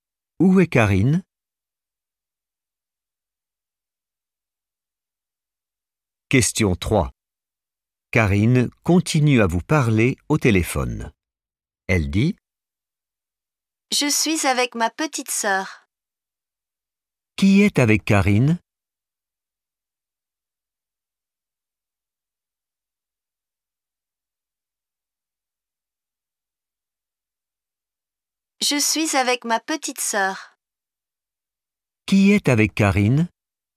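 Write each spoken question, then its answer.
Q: Qui est avec Karine?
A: sa petite sœur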